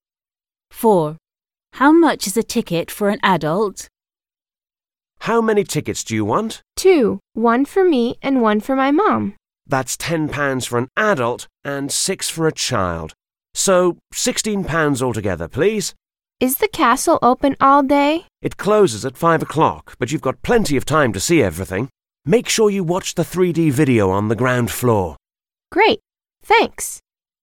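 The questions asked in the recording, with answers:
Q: How much is a ticket for an adult?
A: £10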